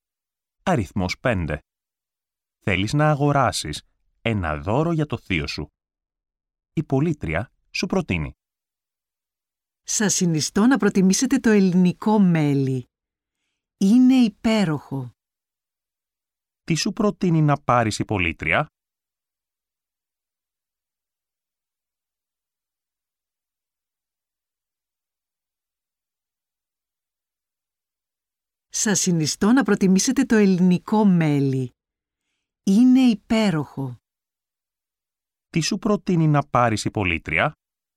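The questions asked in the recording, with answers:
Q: Τι σου προτείνει να πάρεις η πωλήτρια?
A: Ελληνικό μέλι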